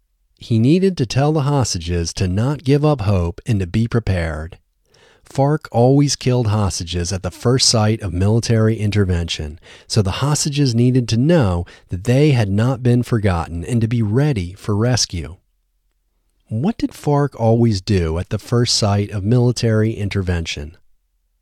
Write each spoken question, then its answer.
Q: What did FARC always do at the first sight of military intervention?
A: FARC always killed hostages at the first sight of military intervention.